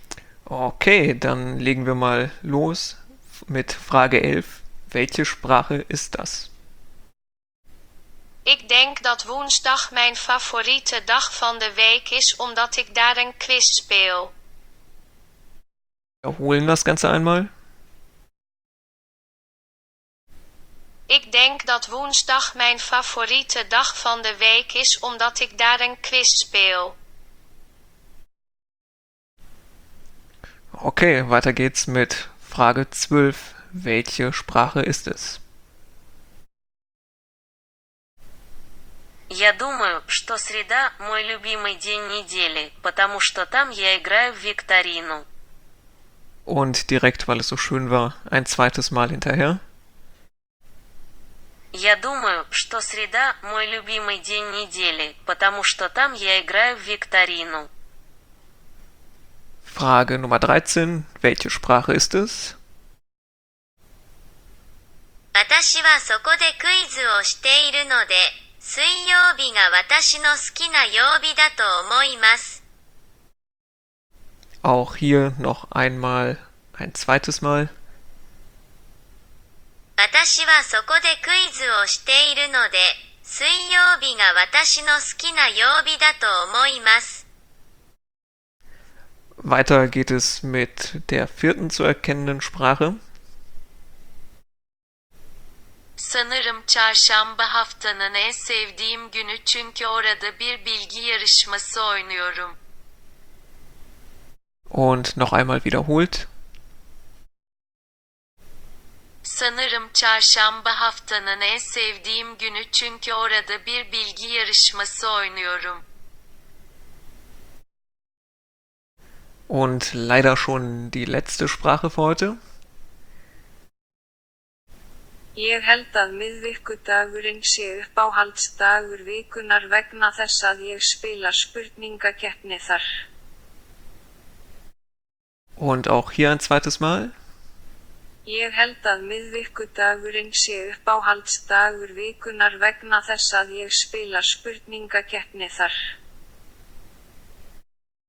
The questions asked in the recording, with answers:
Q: Welche Sprache ist es?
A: Lösung 12. Das war Russisch.

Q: Welche Sprache ist es?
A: Lösung 13 war Japanisch.

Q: weiter geht es mit der vierten zu erkennenden Sprache.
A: Lösung Nummer 14 war Türkisch.

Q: Und leider schon die letzte Sprache für heute.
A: Isländisch.